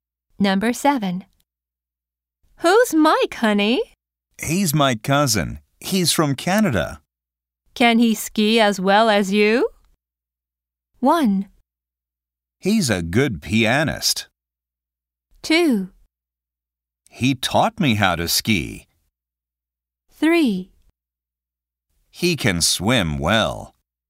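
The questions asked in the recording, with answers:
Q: Can he ski as well as you?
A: 2: He taught me how to ski.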